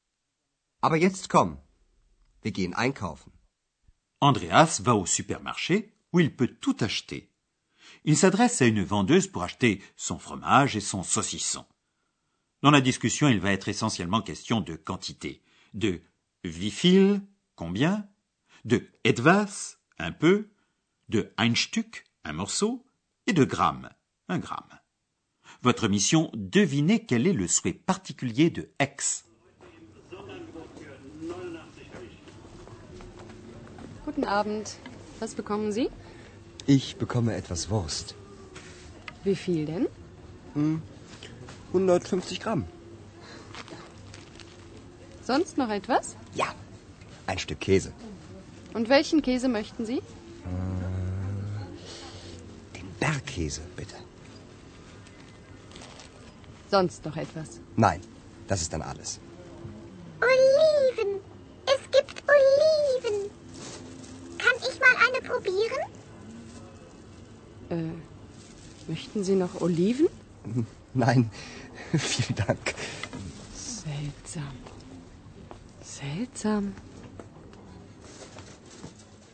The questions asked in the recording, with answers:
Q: Votre mission, devinez quel est le souhait particulier de X.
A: X a découvert des olives et elle aimerait bien en goûter une.